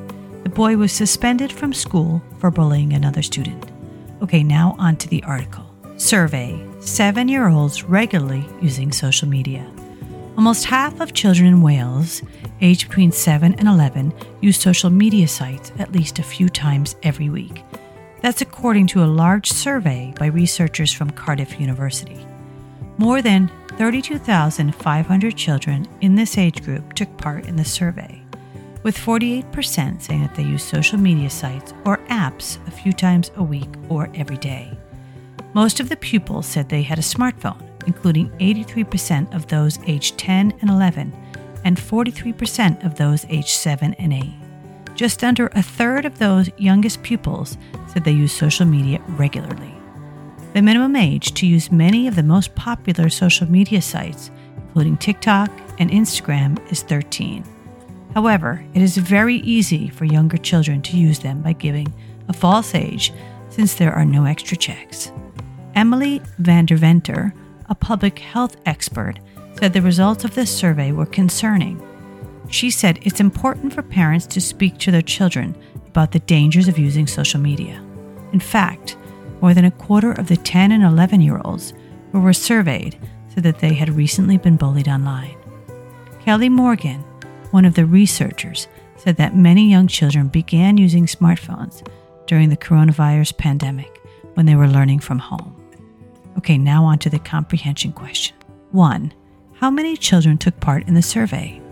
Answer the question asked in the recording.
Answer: Answer, 32,500.